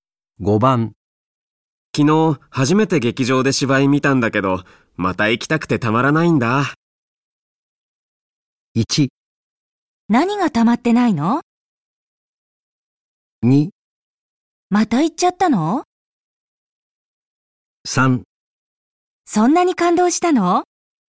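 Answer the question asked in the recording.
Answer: 3: そんなに感動したの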